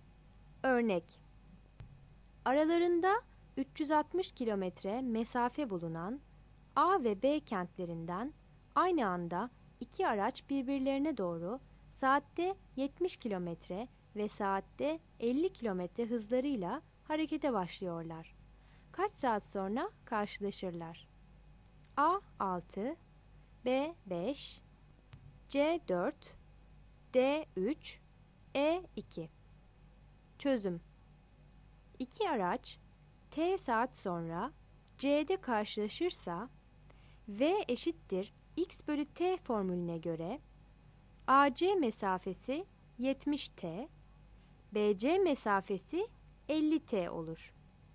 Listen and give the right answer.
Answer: Yanıt D'dir.